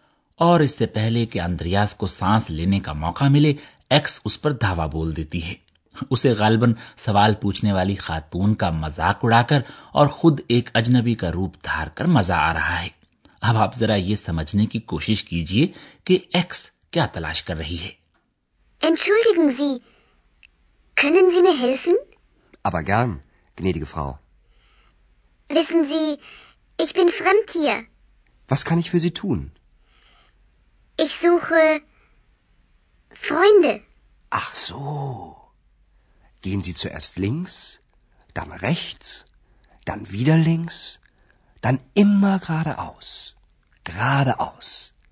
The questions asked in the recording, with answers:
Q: اب آپ ذرا یہ سمجھنے کی کوشش کیجیے کہ x کیا تلاش کر رہی ہے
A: کہتی ہے کہ وہ دوست تلاش کر رہی ہے